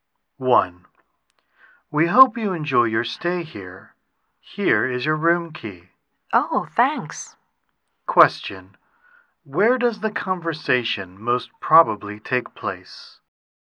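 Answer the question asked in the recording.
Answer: In a hotel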